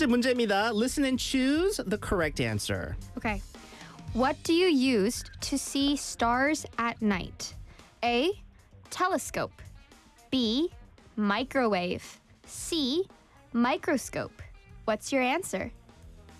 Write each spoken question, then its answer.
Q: What do you use to see stars at night?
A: 정답은 A입니다.